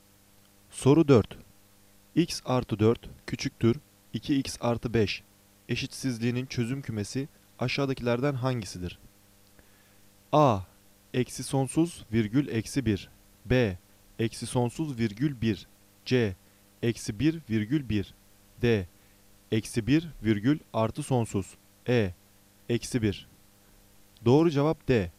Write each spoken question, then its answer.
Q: Eşitsizliğinin çözüm kümesi aşağıdakilerden hangisidir?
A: Doğru cevap D.